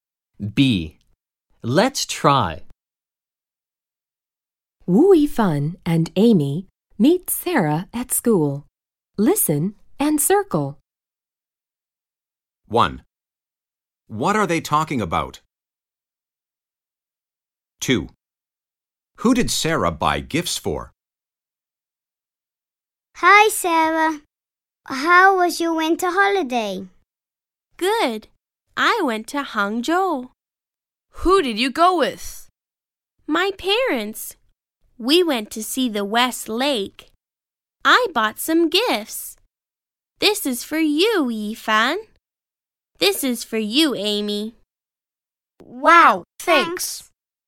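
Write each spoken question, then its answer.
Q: What are they talking about?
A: Sarah's winter holiday

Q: Who did Sarah buy gifts for?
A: Wu Yifan and Amy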